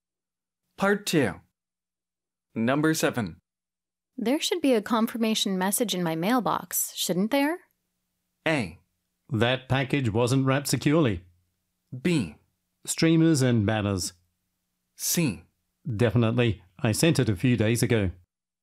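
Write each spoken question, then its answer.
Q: There should be a confirmation message in my mailbox, shouldn't there?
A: C: Definitely. I sent it a few days ago.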